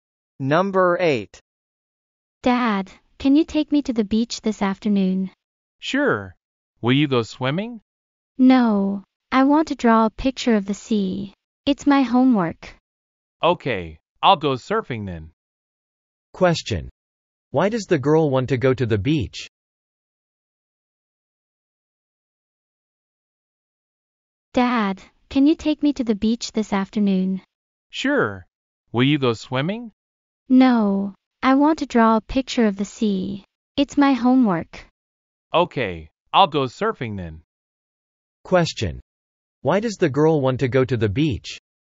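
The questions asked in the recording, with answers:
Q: Question. Why does the girl want to go to the beach?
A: To draw a picture of the sea for her homework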